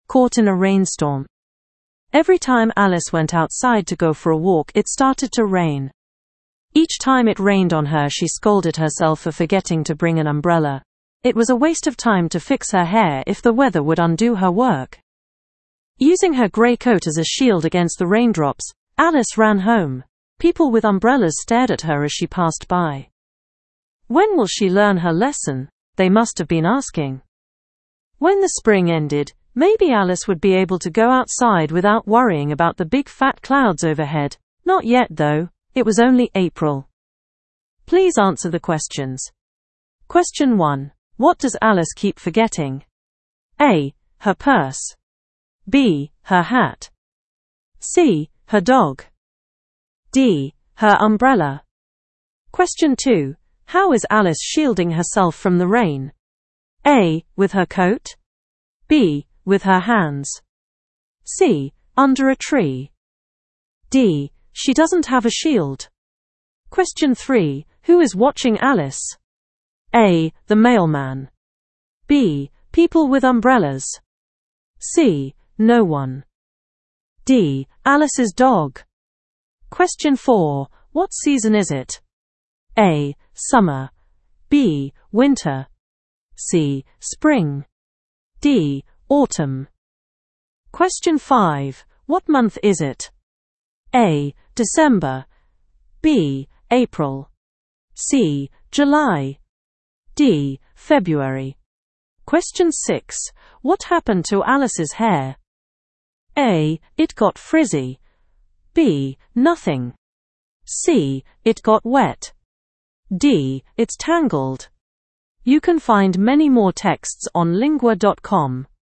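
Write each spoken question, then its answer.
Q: What does Alice keep forgetting?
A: D: Her umbrella.

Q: How is Alice shielding herself from the rain?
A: A: With her coat.

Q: Who is watching Alice?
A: B: People with umbrellas.

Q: What season is it?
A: C: Spring.

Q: What month is it?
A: B: April.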